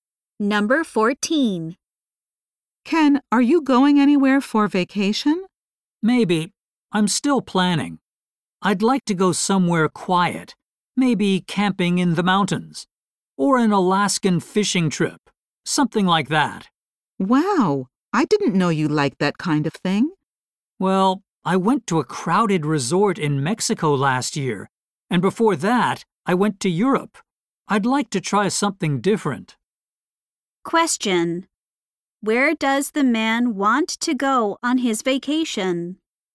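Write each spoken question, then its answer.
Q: Where does the man want to go on his vacation?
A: Somewhere quiet, like the mountains or Alaska.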